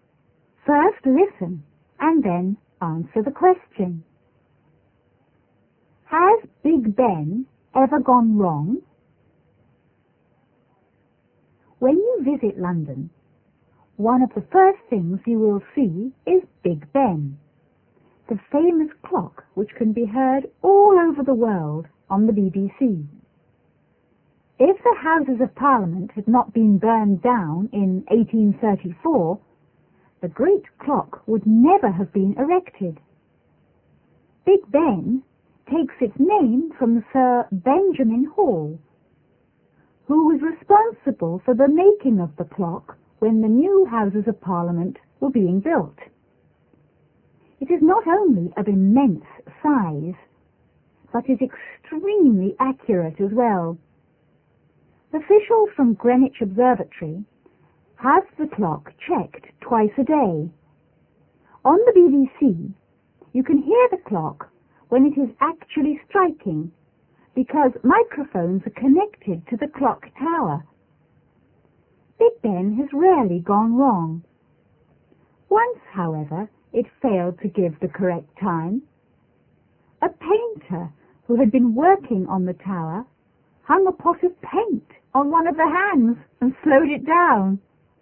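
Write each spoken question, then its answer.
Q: Has Big Ben ever gone wrong?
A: Yes, once, when a painter hung a pot of paint on one of the hands and slowed it down.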